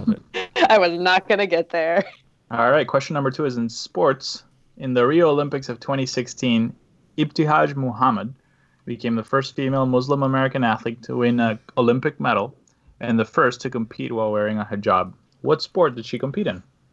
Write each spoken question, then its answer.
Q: What sport did she compete in?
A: Fencing is correct.